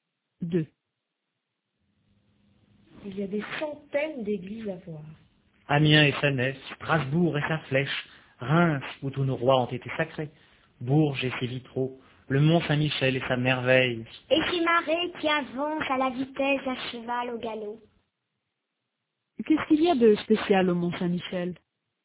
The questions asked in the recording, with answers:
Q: Qu'est-ce qu'il y a de spécial au mont Saint-Michel?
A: Des marées qui avancent à la vitesse d'un cheval au galop.